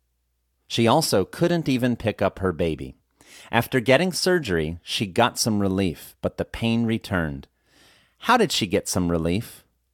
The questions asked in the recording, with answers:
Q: How did she get some relief?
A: She got some relief from surgery.